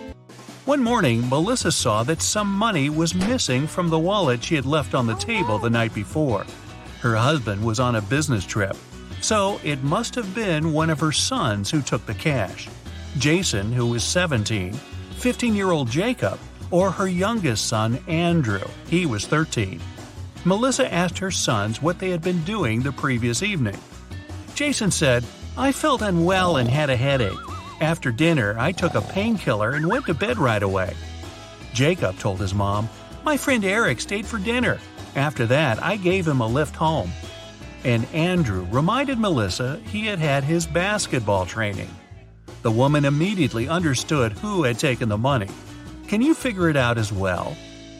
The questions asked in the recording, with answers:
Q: Can you figure it out as well?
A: Jacob was lying. He was only 15 years old and couldn't drive, legally.